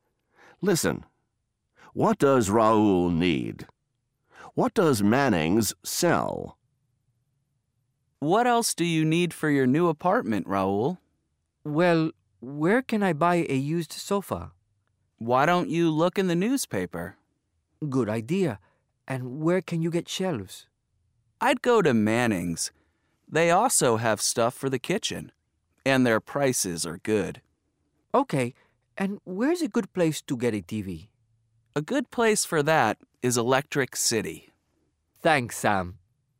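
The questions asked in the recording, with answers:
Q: What does Raoul need?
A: A used sofa, shelves, and a TV

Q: What does Manning's sell?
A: Shelves and stuff for the kitchen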